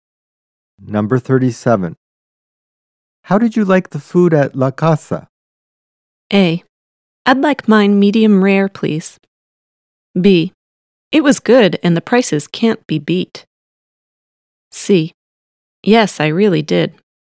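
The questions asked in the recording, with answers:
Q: How did you like the food at La Casa?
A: B: It was good and the prices can't be beat.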